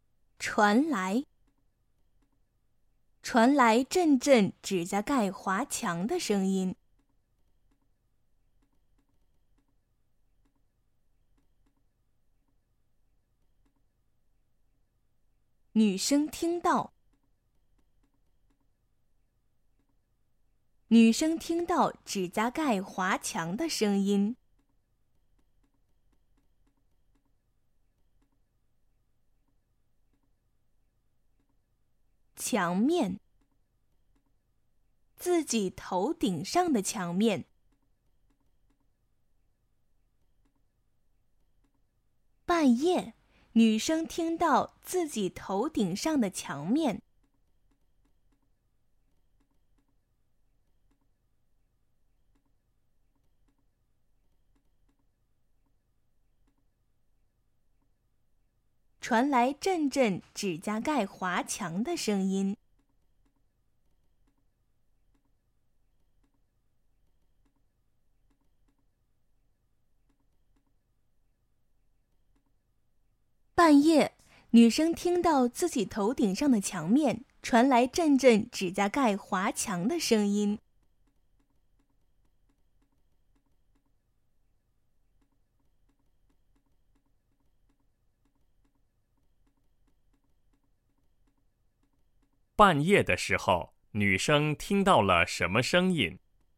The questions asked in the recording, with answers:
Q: 半夜的时候,女生听到了什么声音?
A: 半夜,女生听到自己头顶上的墙面传来阵阵指甲盖划墙的声音。